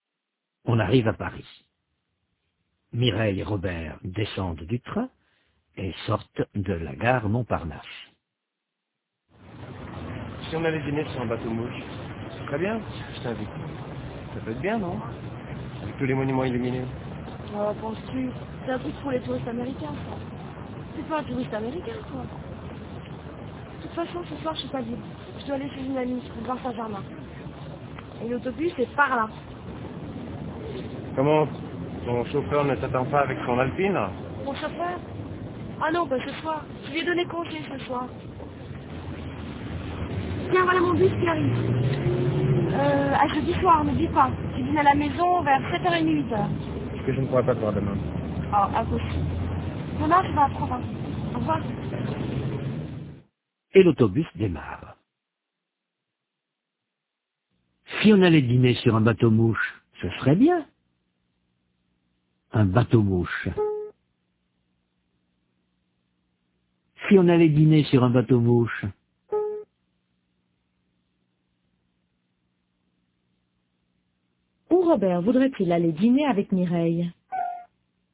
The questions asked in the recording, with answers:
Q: Où Robert voudrait-il aller dîner avec Mireille?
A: Sur un bateau mouche.